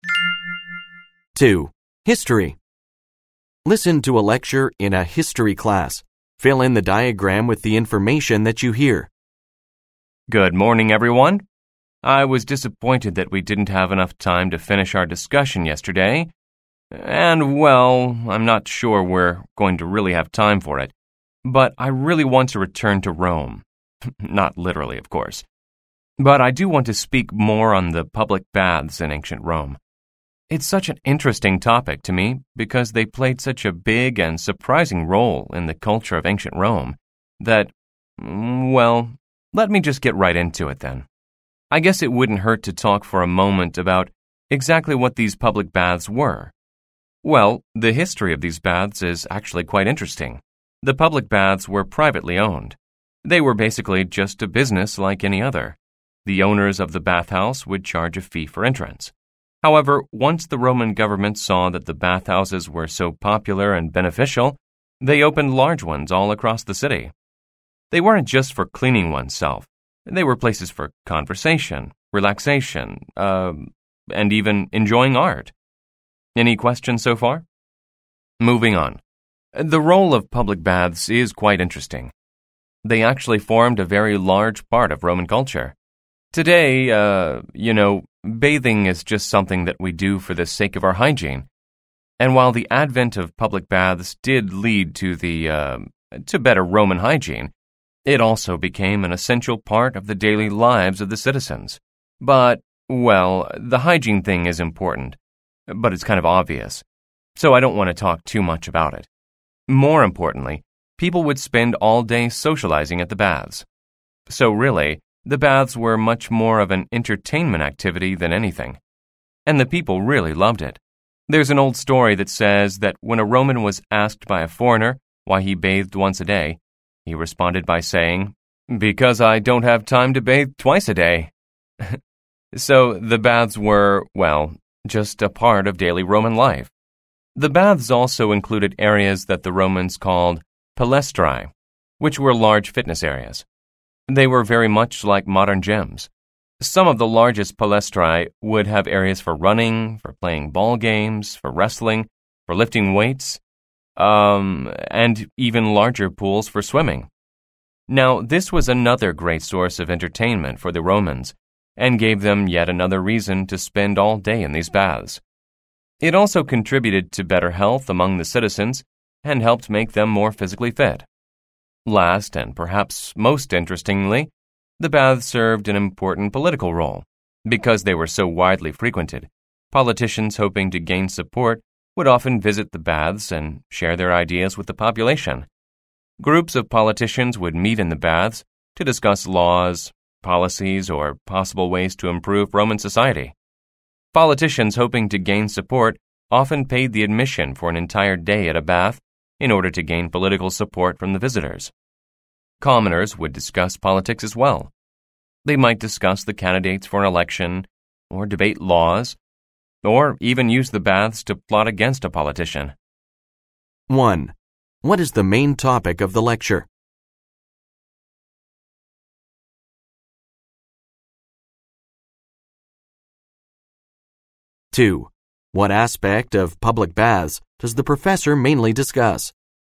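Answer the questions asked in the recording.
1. The public baths in ancient Rome
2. Their role in Roman culture (social, fitness and political)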